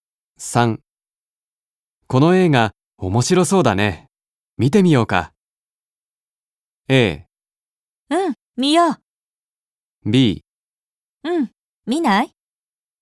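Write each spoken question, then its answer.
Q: この映画面白そうだね、見てみようか。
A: A: うん、見よう。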